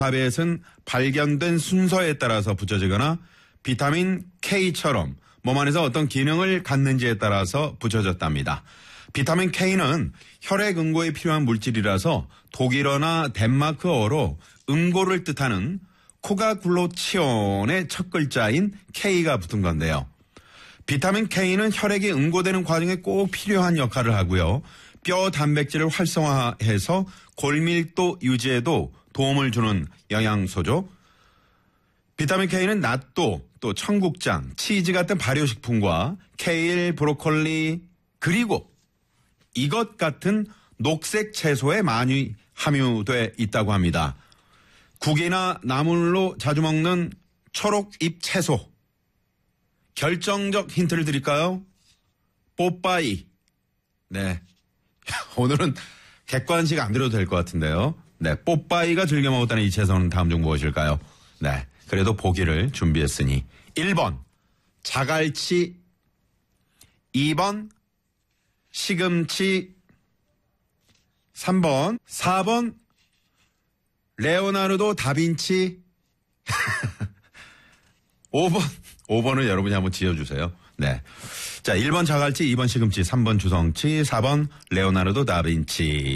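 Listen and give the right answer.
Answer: 2번: 시금치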